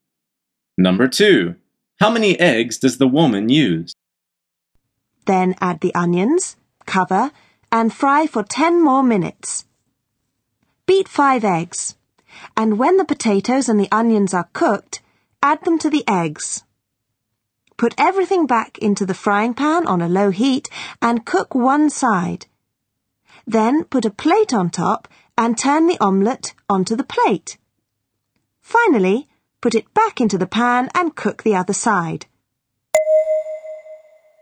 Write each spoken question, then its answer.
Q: How many eggs does the woman use?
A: The answer is 5. She says, beat 5 eggs.